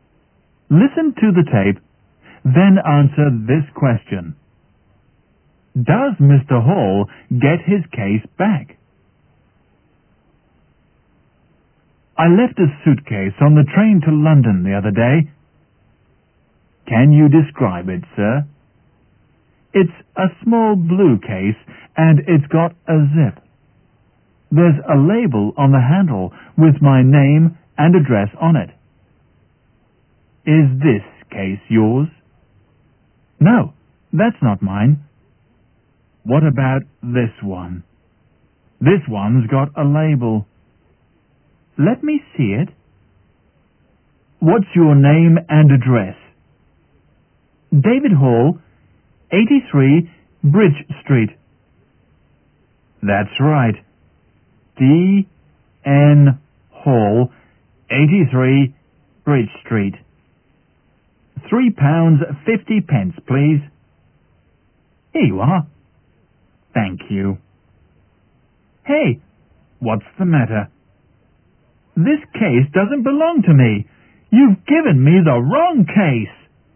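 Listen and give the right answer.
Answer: No, he is given the wrong case.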